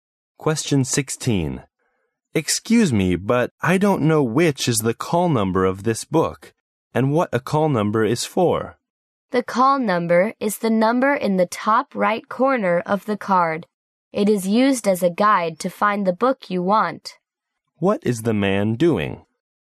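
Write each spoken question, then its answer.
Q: What is the man doing?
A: Explaining what a library call number is and how to use it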